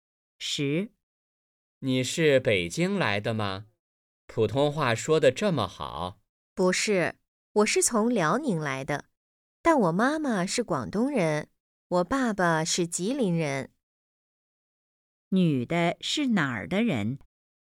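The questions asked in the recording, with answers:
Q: 女的是哪儿的人?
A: 辽宁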